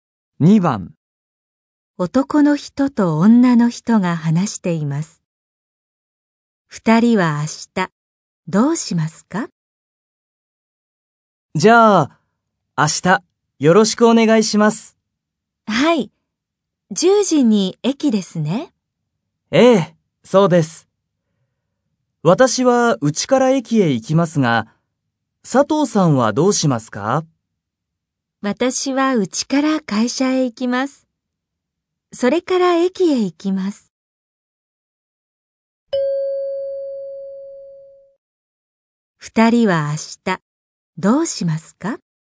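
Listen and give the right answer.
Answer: 10時に駅で会います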